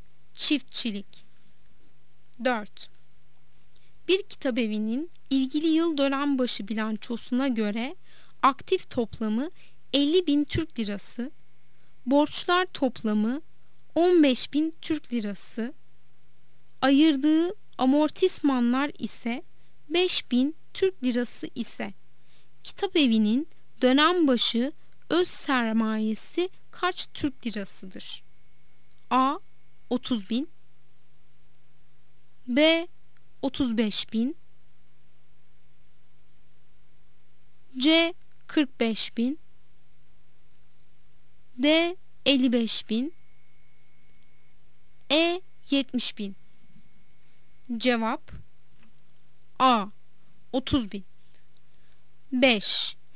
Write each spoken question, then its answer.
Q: Bir kitabevinin ilgili yıl dönembaşı bilançosuna göre aktif toplamı 50 bin Türk lirası, borçlar toplamı 15 bin Türk lirası, ayırdığı amortismanlar ise 5 bin Türk lirası ise kitabevinin dönembaşı öz sermayesi kaç Türk lirasıdır?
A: Cevap A. 30 bin.